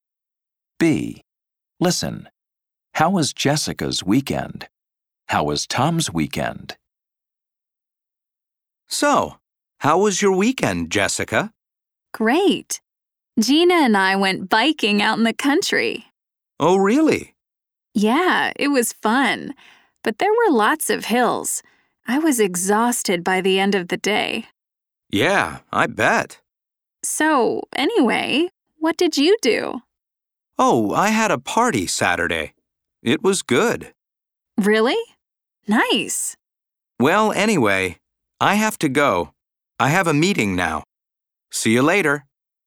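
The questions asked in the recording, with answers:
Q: How was Jessica's weekend?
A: Great, fun but tiring; she went biking in the country with Gina and was exhausted.

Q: How was Tom's weekend?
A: Good; he had a party on Saturday.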